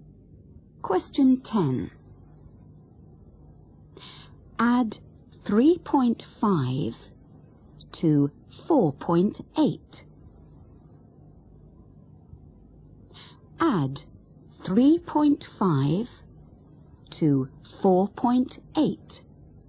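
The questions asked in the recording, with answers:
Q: Add 3.5 to 4.8.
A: 8.3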